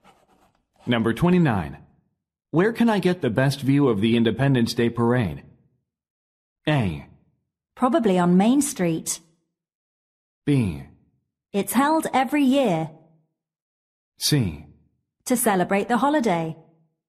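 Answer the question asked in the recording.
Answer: A: Probably on Main Street.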